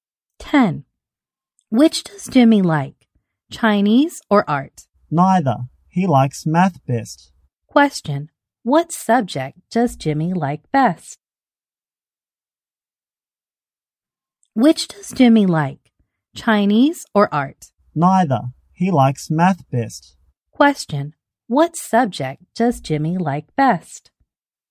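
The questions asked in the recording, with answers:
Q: What subject does Jimmy like best?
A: Math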